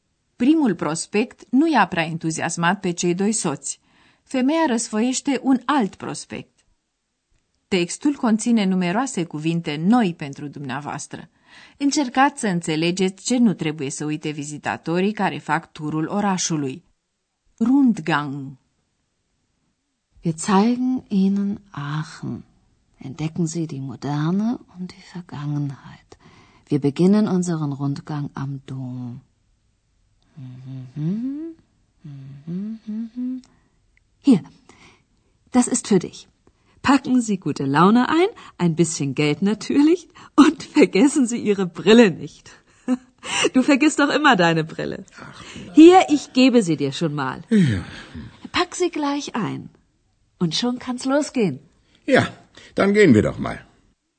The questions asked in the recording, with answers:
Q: Încercați să înțelegeți ce nu trebuie să uite vizitatorii care fac turul orașului.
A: Vizitatorii sunt sfătuiți pe un ton glumeț să nu-și uite ochelarii